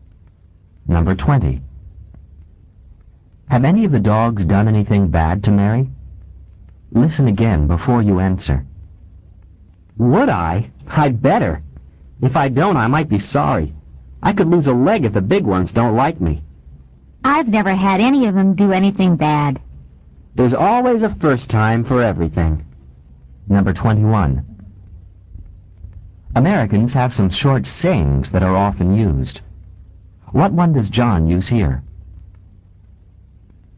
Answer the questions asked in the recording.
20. Number 20, no, they haven't.
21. Number 21, there's always, A-L-W-A-Y-S, a first time for everything,